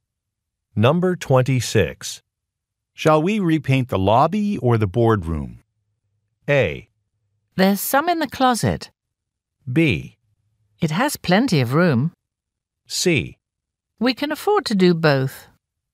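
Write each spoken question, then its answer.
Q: Shall we repaint the lobby or the boardroom?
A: C: We can afford to do both.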